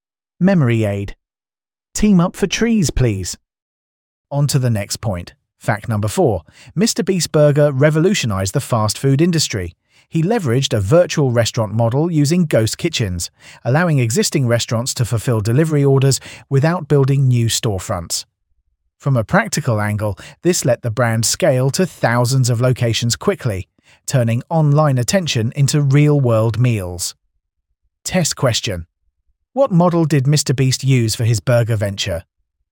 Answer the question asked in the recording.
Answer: Correct answer. Virtual restaurant.